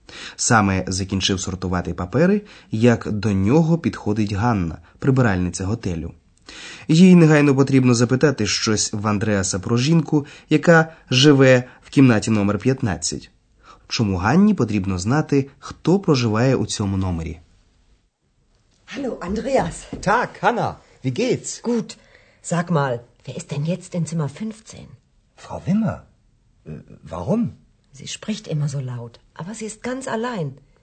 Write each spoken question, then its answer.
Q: Чому Ганні потрібно знати, хто проживає у цьому номері?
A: Ганна помітила, що якась жінка у кімнаті номер 15 spricht immer so laut.